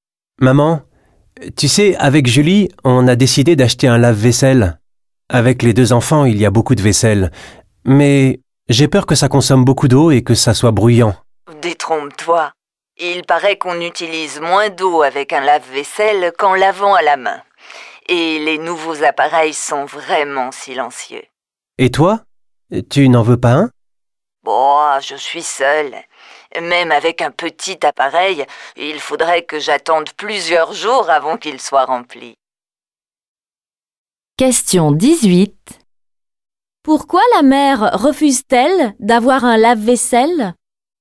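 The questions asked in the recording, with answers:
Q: Pourquoi la mère refuse-t-elle d'avoir un lave-vaisselle?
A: Parce qu'elle vit seule et qu'elle devrait attendre plusieurs jours avant qu'il soit rempli.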